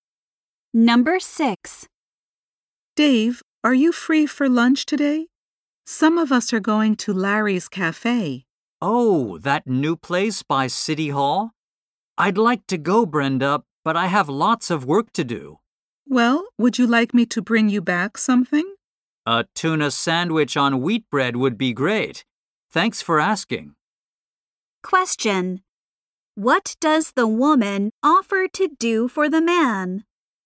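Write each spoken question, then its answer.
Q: What does the woman offer to do for the man?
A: Bring him back a sandwich for lunch.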